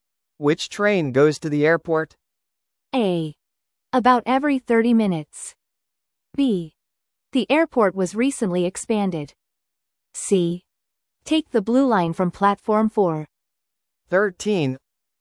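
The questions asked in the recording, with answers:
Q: Which train goes to the airport?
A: C: Take the blue line from platform 4.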